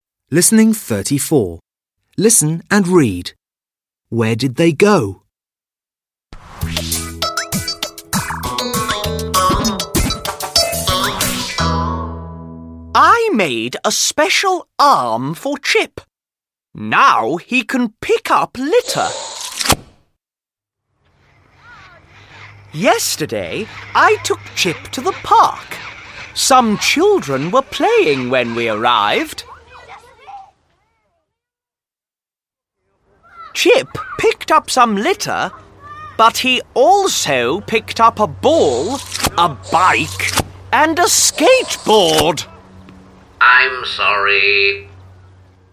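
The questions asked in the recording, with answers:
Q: Where did they go?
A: To the park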